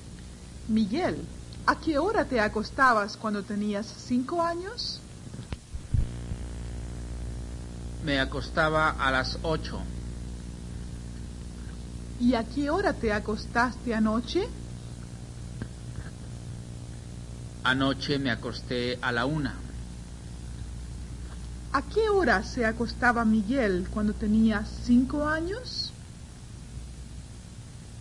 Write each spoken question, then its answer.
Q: ¿A qué hora se acostaba Miguel cuando tenía 5 años?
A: Miguel se acostaba a las 8.